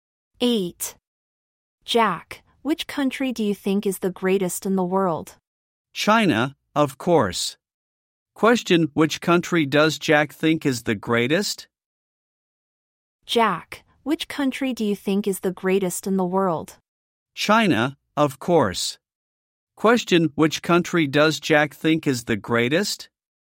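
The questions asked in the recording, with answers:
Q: Question, which country does Jack think is the greatest?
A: China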